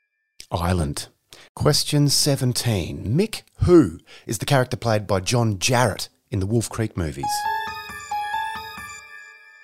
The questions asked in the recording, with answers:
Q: Mick Who is the character played by John Jarratt in the Wolf Creek movies?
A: Mick Taylor.